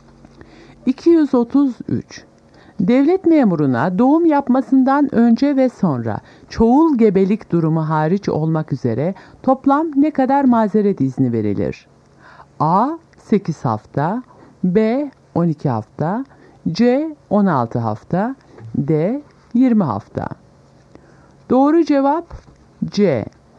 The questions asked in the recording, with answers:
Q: Devlet memuruna doğum yapmasından önce ve sonra çoğul gebelik durumu hariç olmak üzere toplam ne kadar mazeret izni verilir?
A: Doğru cevap C. 16 hafta.